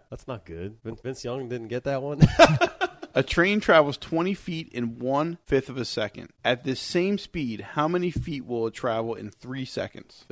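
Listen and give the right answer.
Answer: 300 feet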